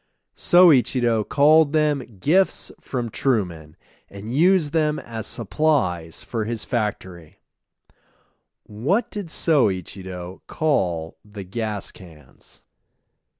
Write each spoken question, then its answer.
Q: What did Soichiro call the gas cans?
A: He called them gifts from Truman.